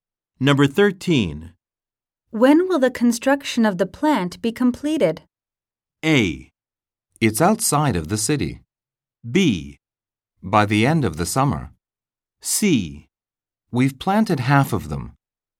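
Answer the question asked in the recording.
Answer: B: By the end of the summer.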